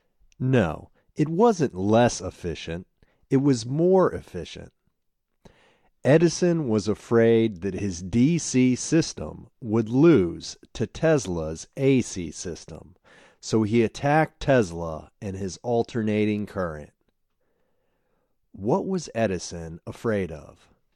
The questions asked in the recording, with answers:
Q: What was Edison afraid of?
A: He was afraid that his DC system would lose to Tesla's AC system.